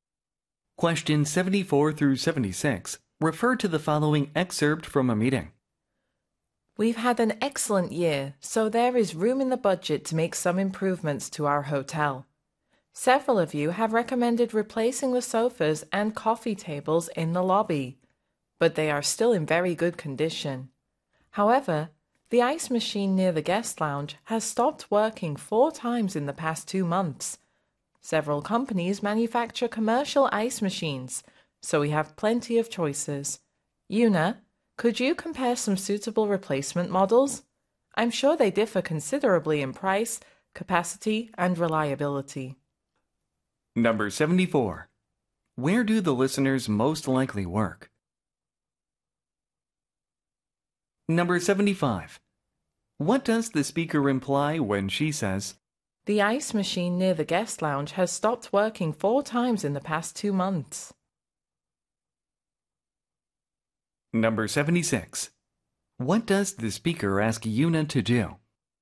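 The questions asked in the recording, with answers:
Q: Where do the listeners most likely work?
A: At a hotel

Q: What does the speaker imply when she says,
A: The ice machine should be replaced

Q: What does the speaker ask Una to do?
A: Compare some suitable replacement ice machine models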